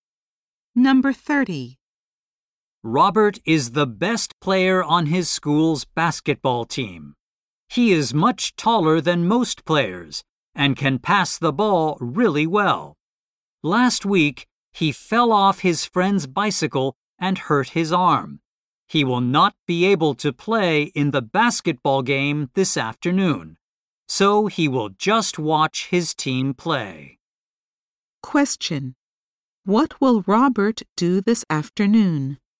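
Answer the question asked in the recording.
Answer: Watch his team play basketball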